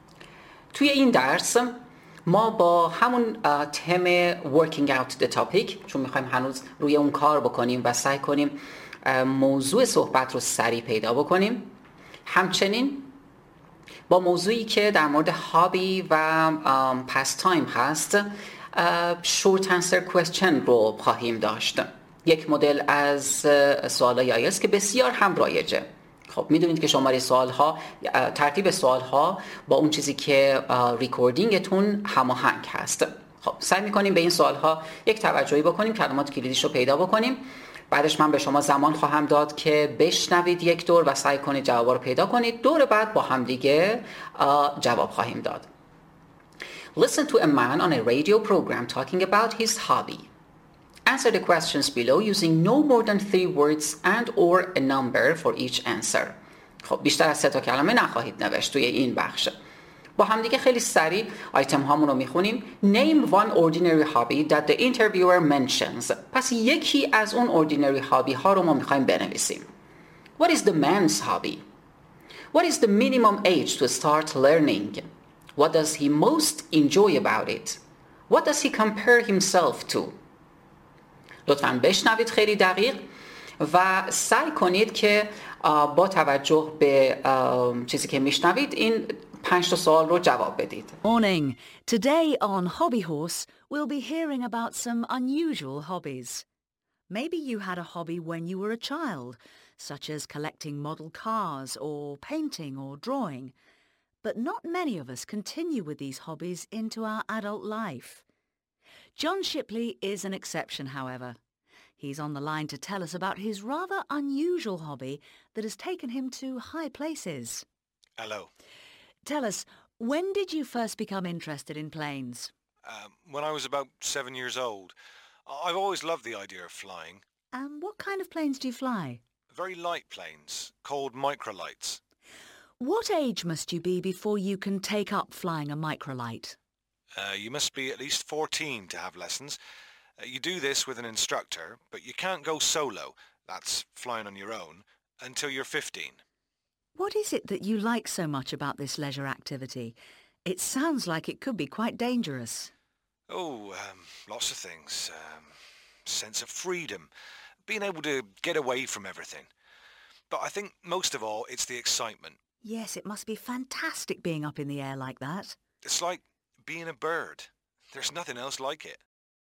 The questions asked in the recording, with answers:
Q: Name one ordinary hobby that the interviewer mentions.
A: Collecting model cars. Painting, drawing.

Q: What is the man's hobby?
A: The man's hobby is flying.

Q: What is the minimum age to start learning?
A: You must be at least 14.